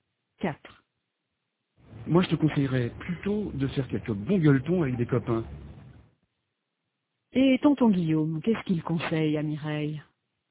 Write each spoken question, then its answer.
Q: Et tonton Guillaume, qu'est-ce qu'il conseille à Mireille?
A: Il lui conseille de faire quelques bons gueuletons avec des copains.